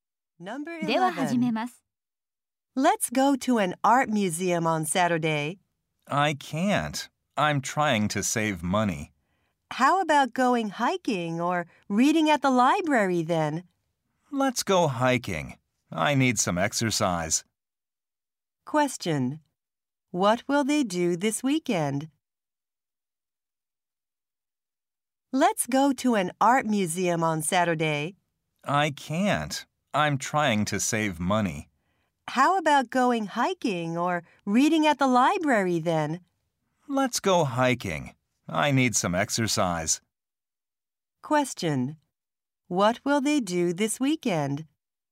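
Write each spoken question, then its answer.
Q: What will they do this weekend?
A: Go hiking.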